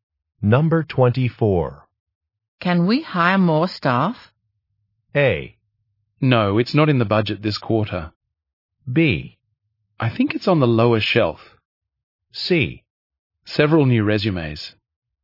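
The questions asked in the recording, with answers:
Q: Can we hire more staff?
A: A: No, it's not in the budget this quarter.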